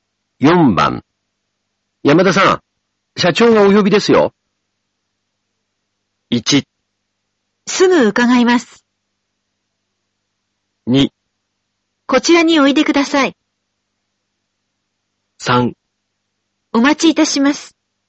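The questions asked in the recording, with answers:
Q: 山田さん、社長がお呼びですよ。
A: 1: すぐ伺います。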